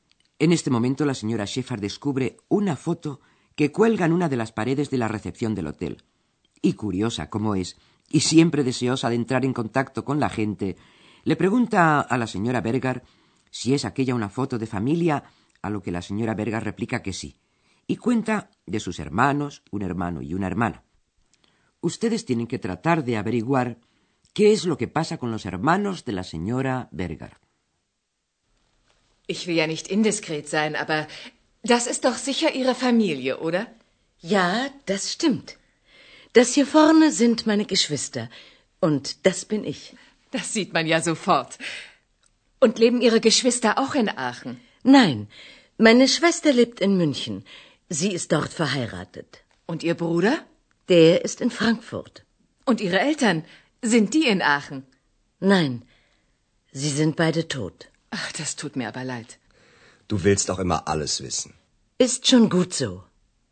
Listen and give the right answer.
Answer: ¿Han logrado ustedes descubrir que la hermana de la señora Berger está casada y vive en Munich y que su hermano vive en Frankfurt?